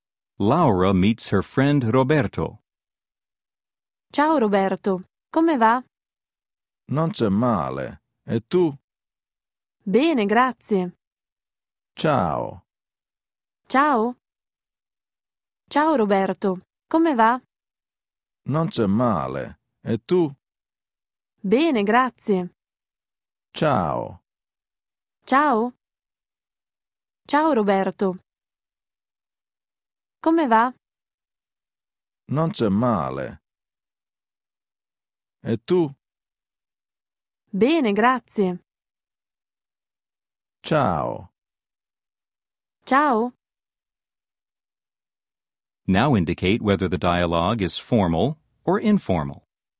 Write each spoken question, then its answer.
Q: Now indicate whether the dialogue is formal or informal.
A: 3. Informale.